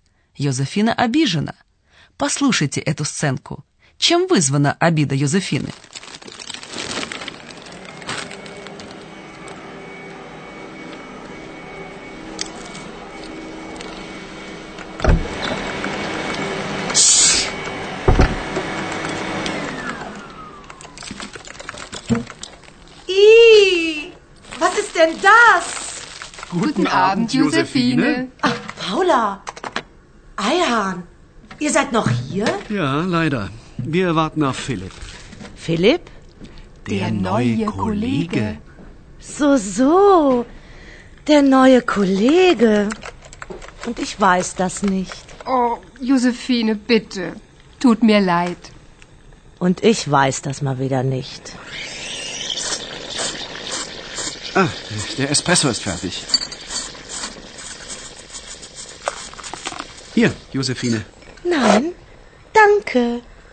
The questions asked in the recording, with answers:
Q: Чем вызвана обида Йозефины?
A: Йозефина обижена тем, что она о новом коллеге ничего не знает.